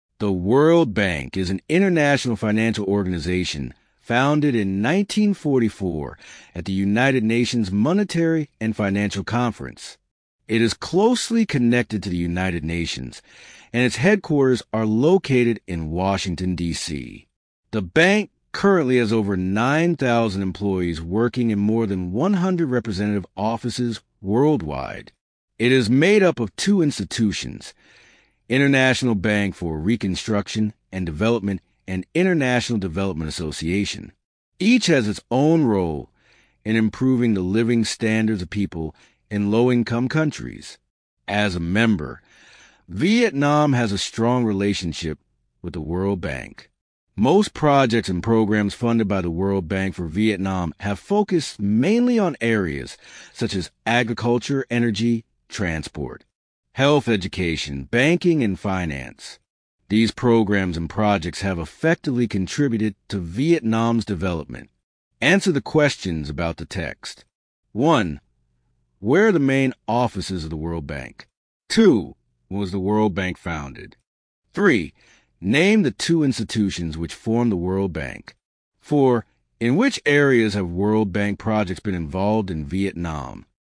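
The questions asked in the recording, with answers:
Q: Where are the main offices of the World Bank?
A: In Washington, D.C.

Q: When was the World Bank founded?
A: In 1944

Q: Name the two institutions which form the World Bank.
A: International Bank for Reconstruction and Development and International Development Association

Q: In which areas have World Bank projects been involved in Vietnam?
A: Agriculture, energy, transport, health, education, banking, and finance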